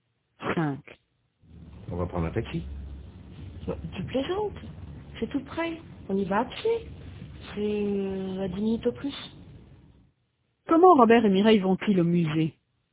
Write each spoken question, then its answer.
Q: Comment Robert et Mireille vont-ils au musée?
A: À pied.